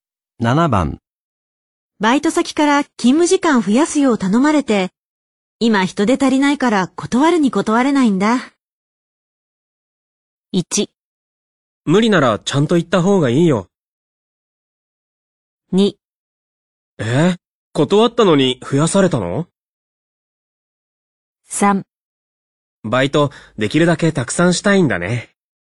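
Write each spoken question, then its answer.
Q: バイト先から勤務時間増やすよう頼まれて、今人手足りないから断るに断れないんだ。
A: 1: 無理ならちゃんと言った方がいいよ。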